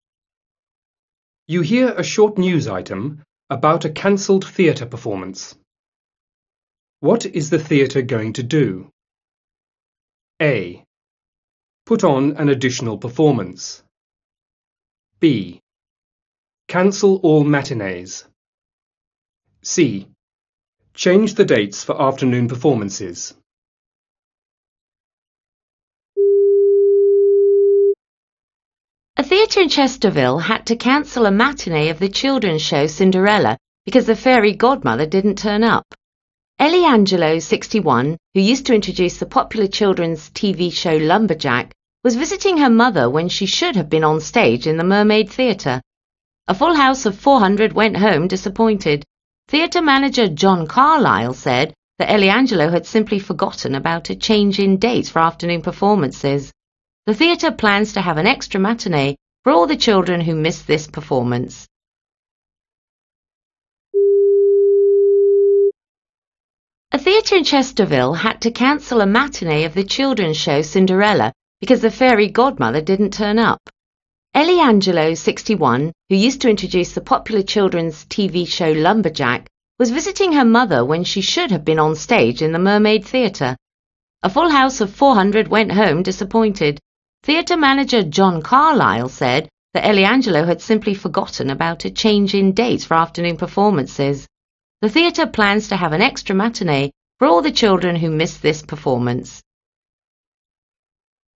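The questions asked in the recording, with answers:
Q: What is the theatre going to do?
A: A: Put on an additional performance.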